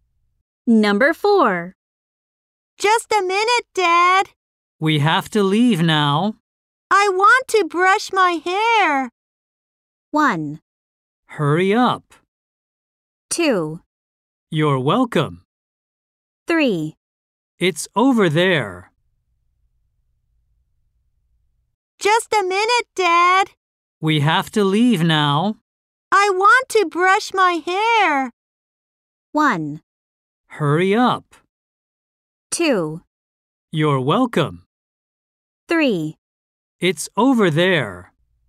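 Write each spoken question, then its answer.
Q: I want to brush my hair.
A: 1: Hurry up.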